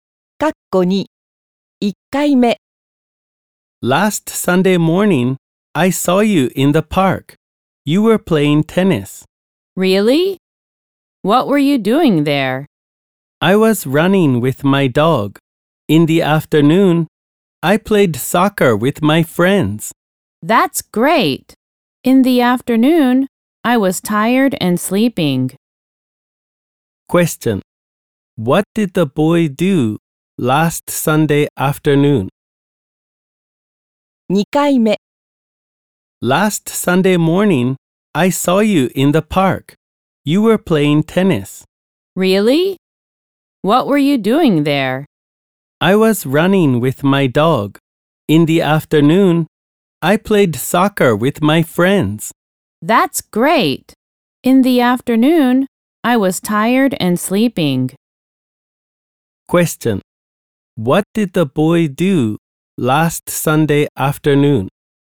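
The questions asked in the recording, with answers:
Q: What did the boy do last Sunday afternoon?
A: He played soccer with his friends.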